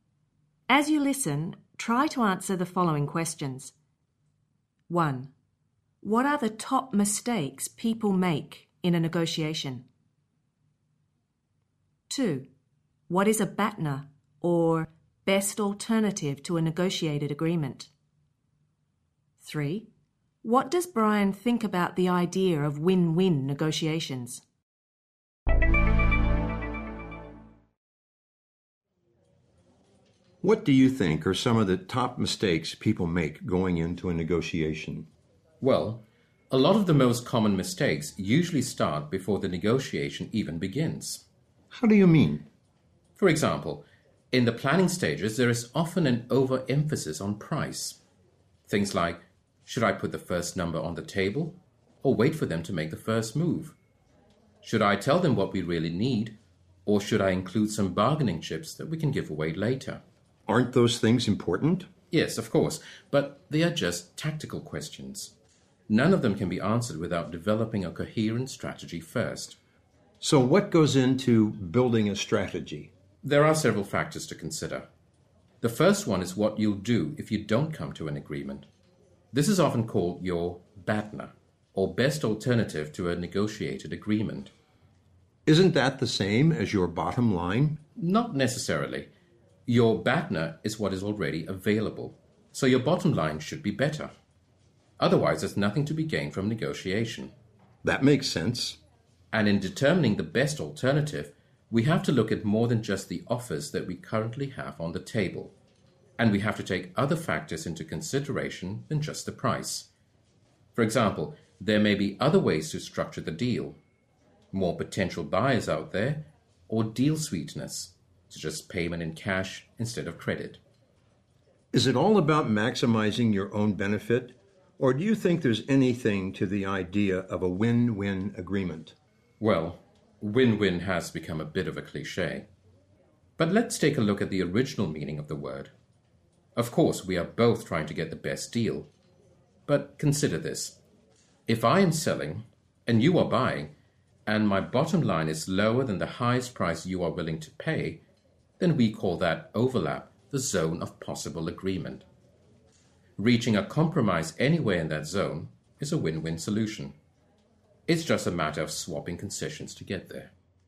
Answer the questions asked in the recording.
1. Brian says people have an overemphasis, that is, too much emphasis, on price.
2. Brian is saying that our BATNA is what we will do if we don't reach an agreement.
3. What Brian is saying is that all negotiations, to be successful, must be win-win.